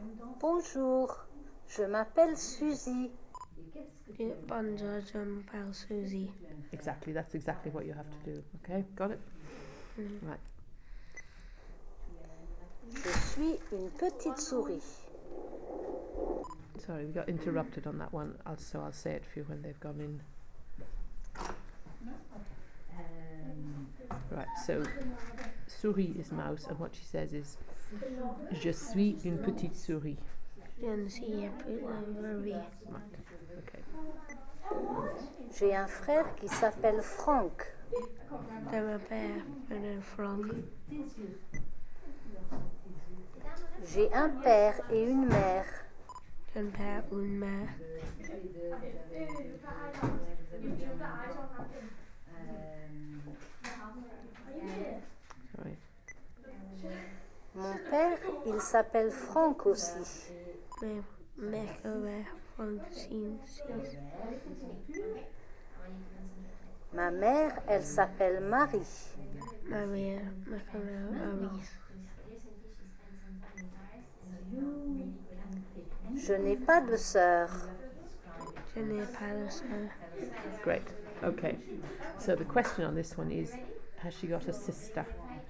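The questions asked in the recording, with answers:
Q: has she got a sister?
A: No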